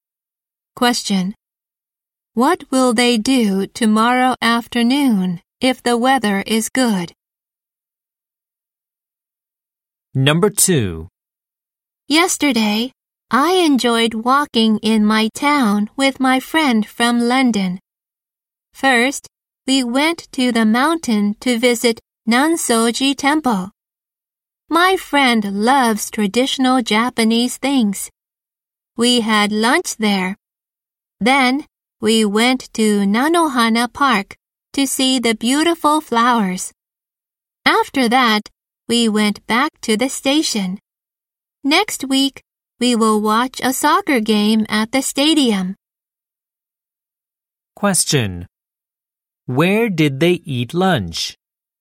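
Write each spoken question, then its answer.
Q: Where did they eat lunch?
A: At Nansoji Temple.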